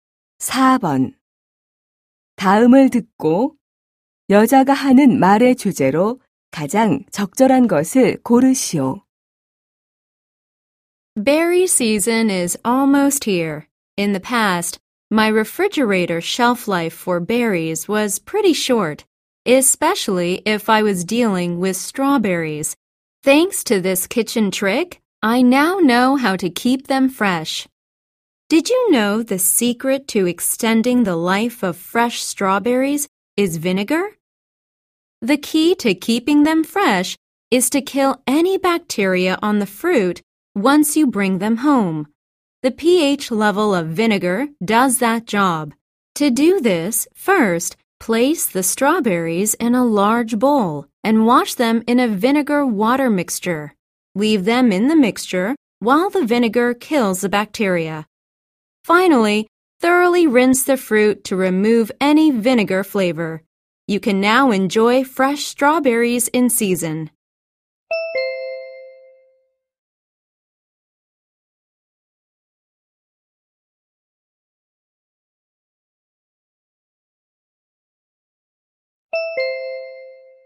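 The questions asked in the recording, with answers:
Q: 다음을 듣고 여자가 하는 말의 주제로 가장 적절한 것을 고르시오.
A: 식초를 이용해 딸기를 신선하게 보관하는 방법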